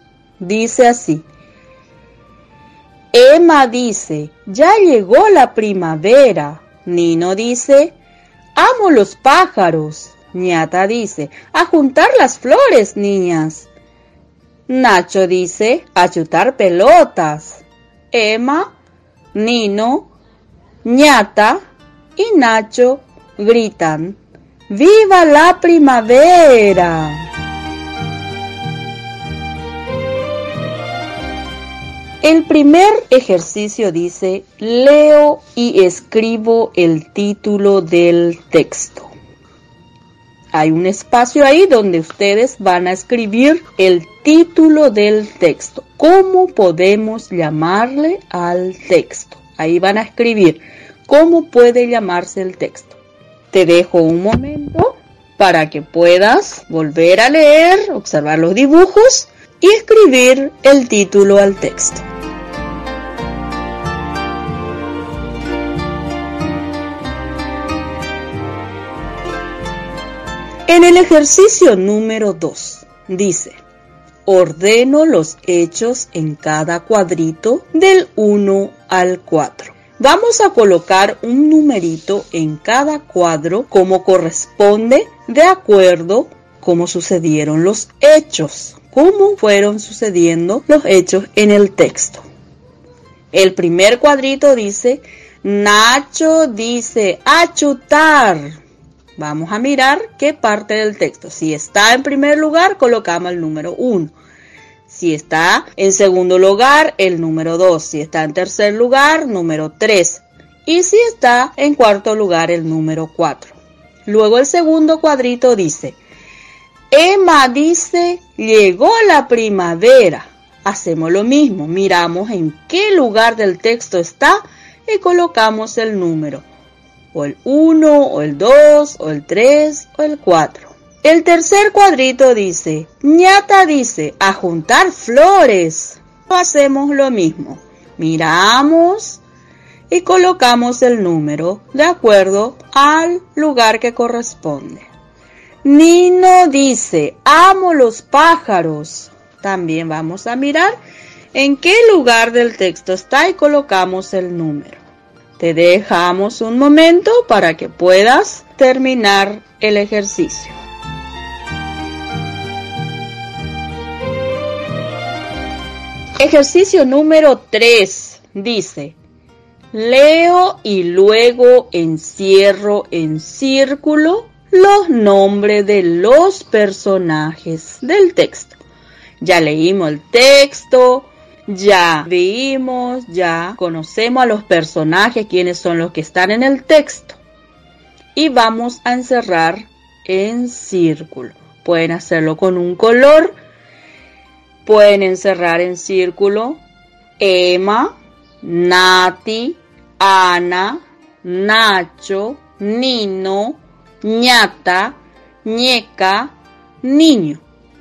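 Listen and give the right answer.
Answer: Emma, Nino, Ñata, Nacho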